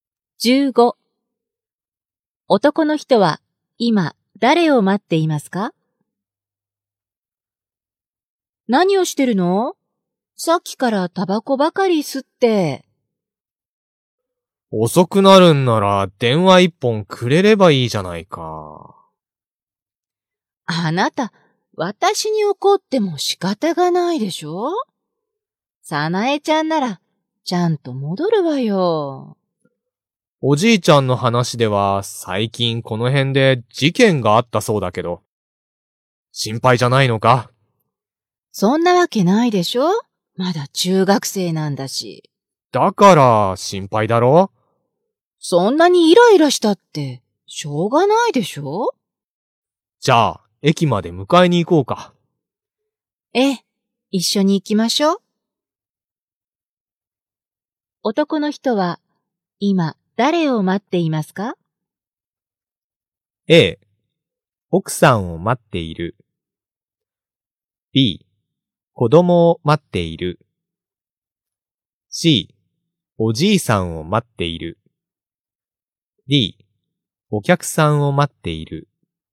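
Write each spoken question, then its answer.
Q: 男の人は、今、誰を待っていますか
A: B: 子供を待っている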